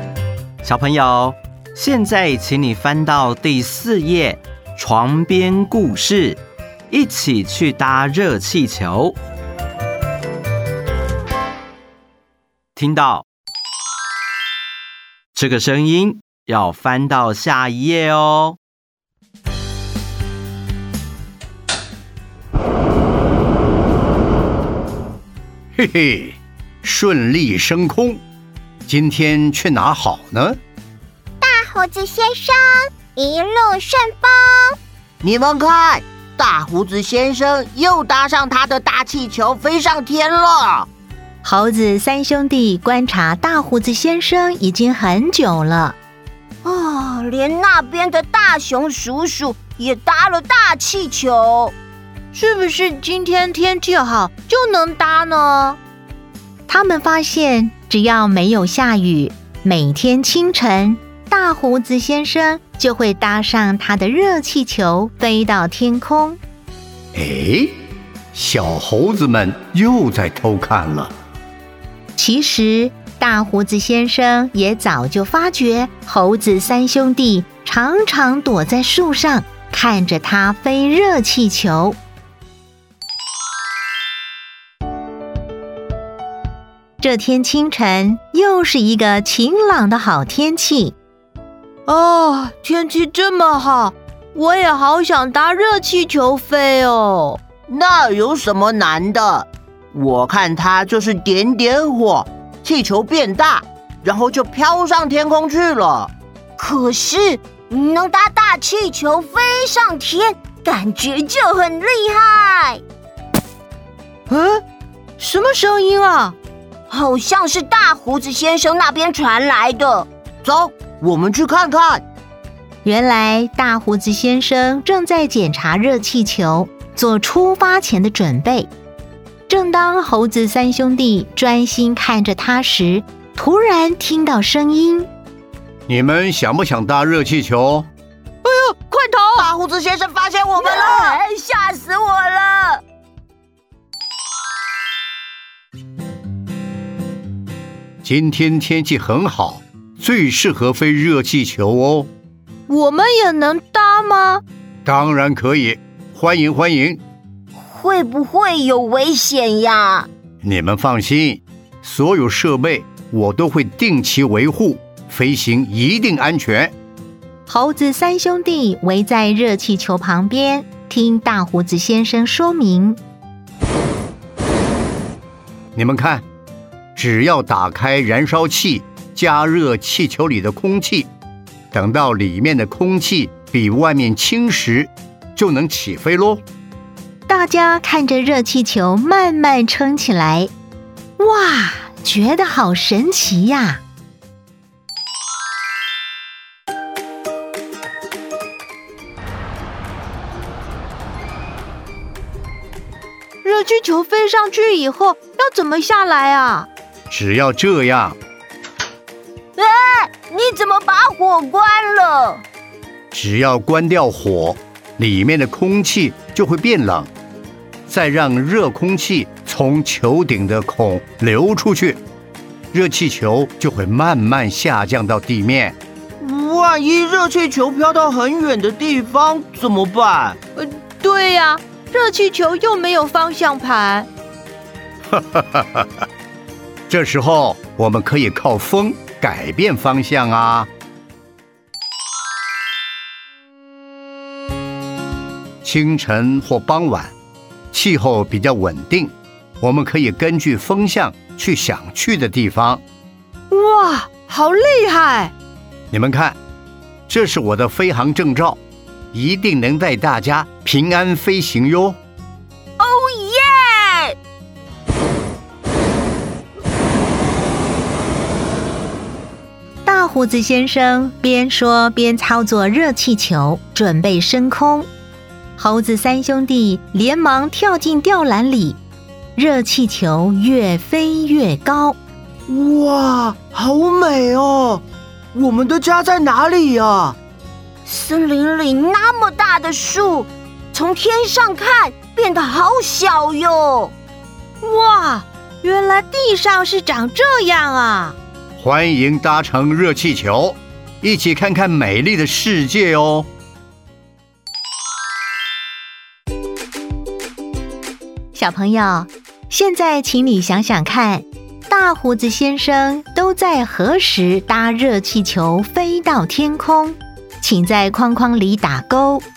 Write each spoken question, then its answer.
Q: 小朋友,现在请你想想看,大胡子先生都在何时搭热气球飞到天空?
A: 清晨。